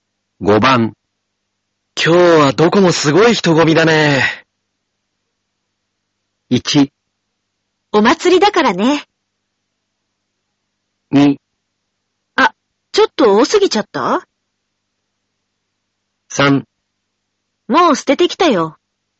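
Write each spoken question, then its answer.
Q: どこもすごい人混みだね。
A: 1: お祭りだからね。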